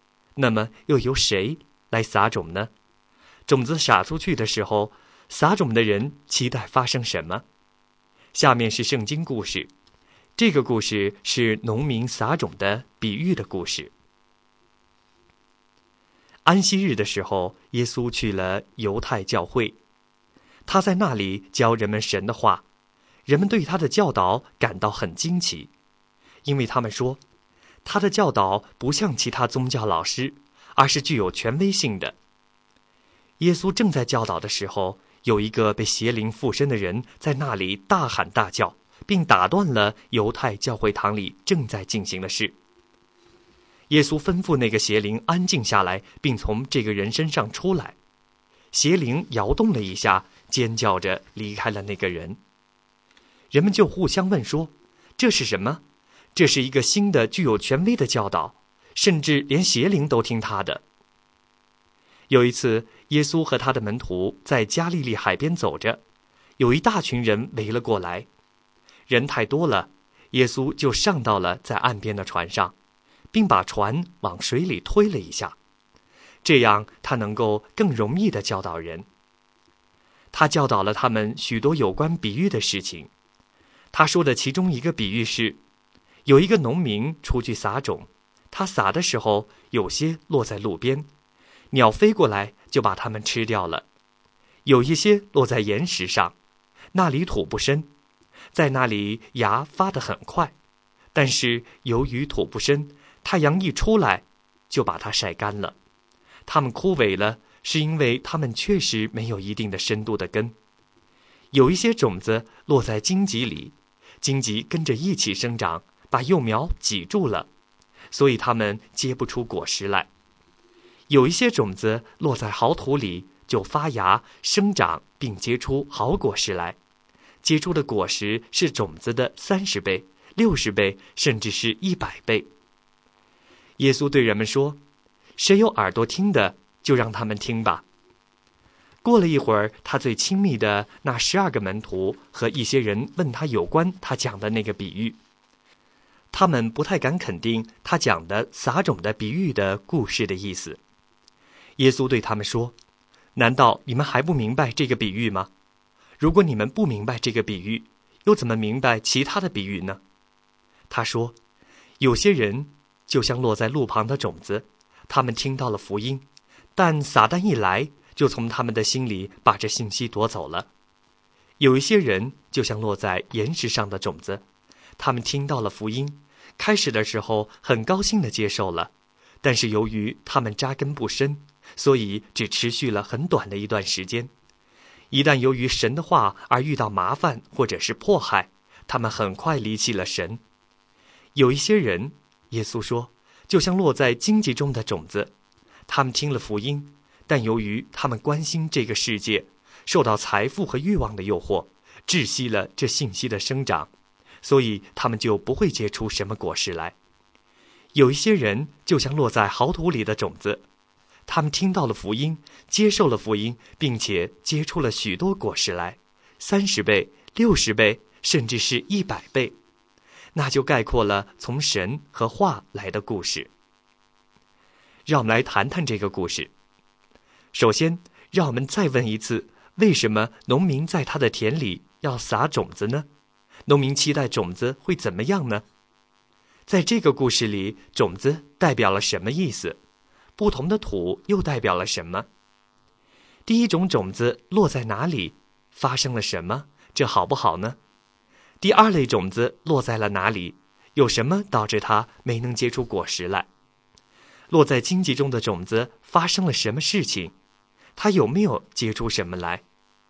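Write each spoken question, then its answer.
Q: 第一种种子落在哪里?发生了什么?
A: 落在路边,鸟飞过来把它们吃掉了

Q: 第二类种子落在了哪里?有什么导致它没能结出果实来?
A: 落在岩石上;土不深,根不深,太阳一出来就晒干枯萎了

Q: 落在荆棘中的种子发生了什么事情?它有没有结出什么来?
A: 荆棘把幼苗挤住了,没有结出果实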